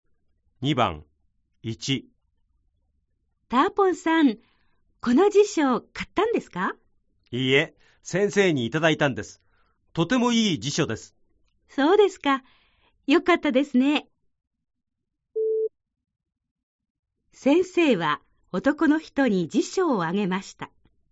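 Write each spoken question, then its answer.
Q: 先生は男の人に辞書をあげました。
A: ○(正しい)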